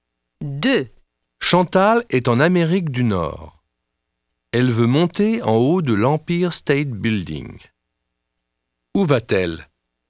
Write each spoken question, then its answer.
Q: Où va-t-elle?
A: Elle va à New York.